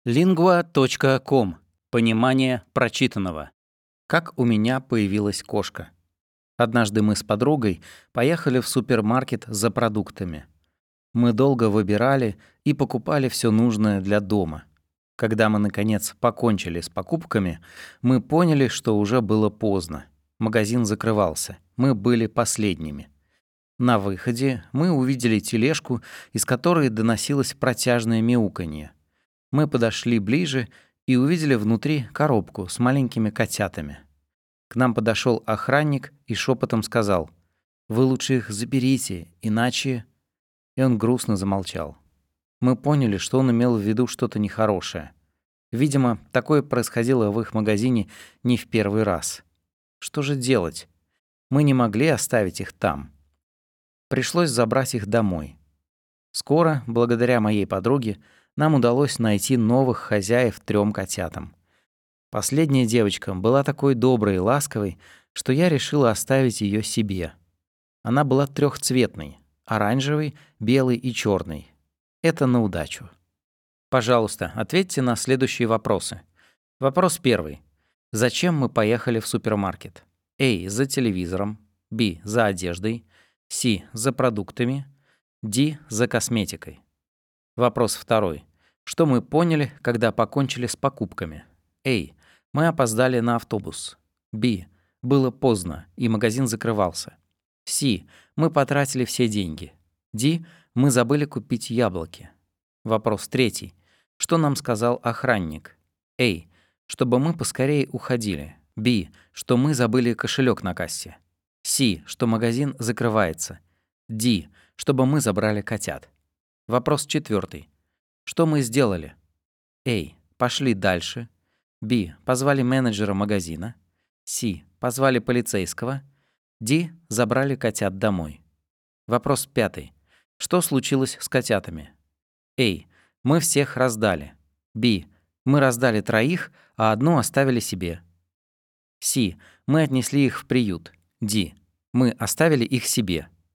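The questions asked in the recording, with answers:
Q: Зачем мы поехали в супермаркет?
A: С: За продуктами.

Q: Что мы поняли, когда покончили с покупками?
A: Б: Было поздно, и магазин закрывался.

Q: Что нам сказал охранник?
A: Д: Чтобы мы забрали котят.

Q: Что мы сделали?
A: Д: Забрали котят домой.

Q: Что случилось с котятами?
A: Б: Мы раздали троих, а одну оставили себе.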